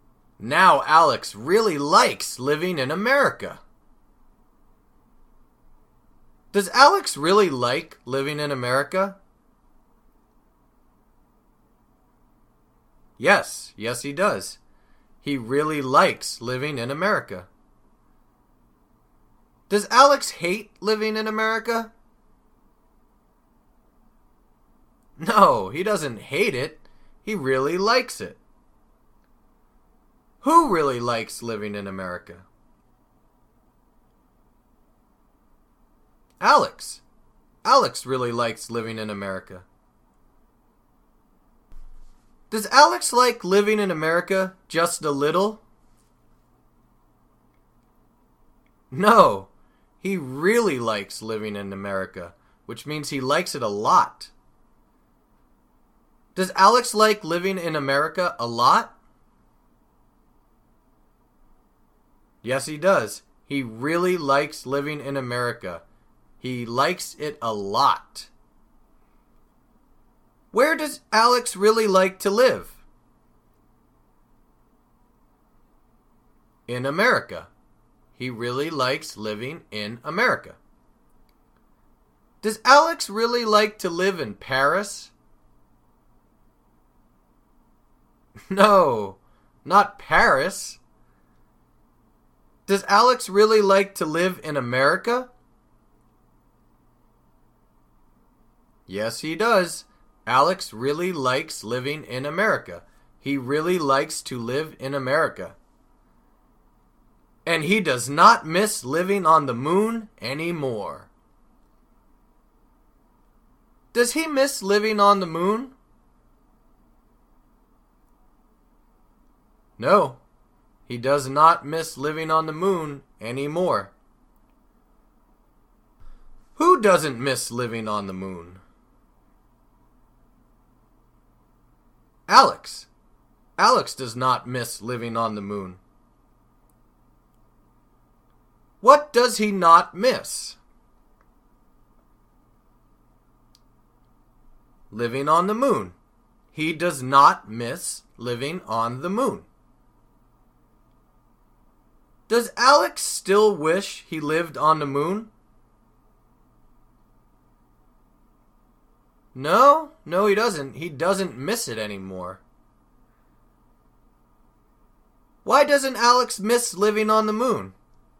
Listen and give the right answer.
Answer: Well, because he really likes living in America now, so he no longer misses living on the moon.